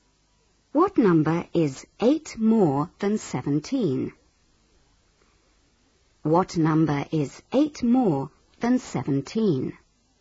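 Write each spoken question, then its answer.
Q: What number is 8 more than 17?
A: 25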